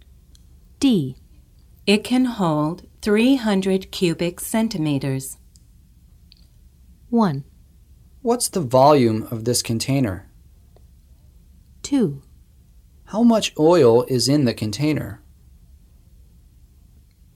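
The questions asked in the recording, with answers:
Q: It can hold 300 cubic centimeters.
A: 1: What's the volume of this container?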